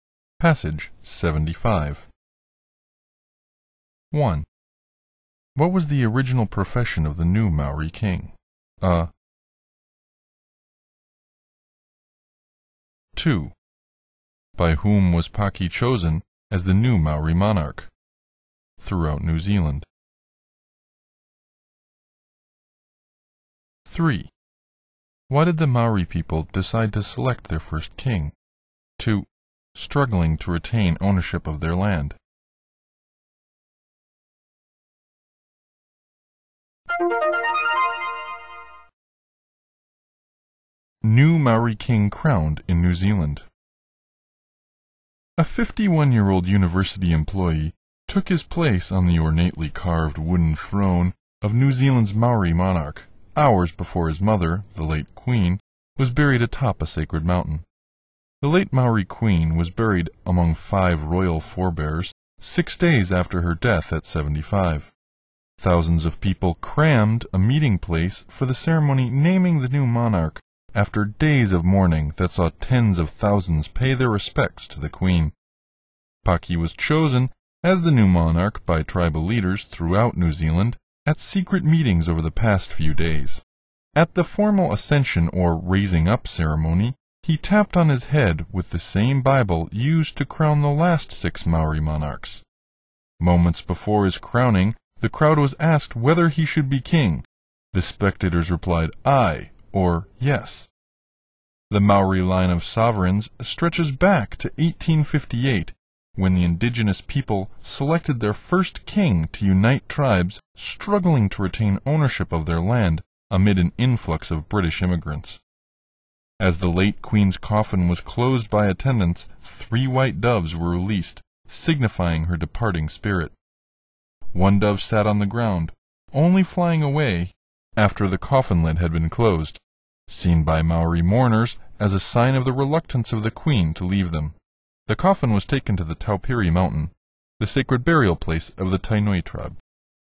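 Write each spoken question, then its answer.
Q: What was the original profession of the new Maori king?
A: A university employee

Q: By whom was Paki chosen as the new Maori monarch throughout New Zealand?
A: By tribal leaders

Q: Why did the Maori people decide to select their first king?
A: To unite tribes struggling to retain ownership of their land amid an influx of British immigrants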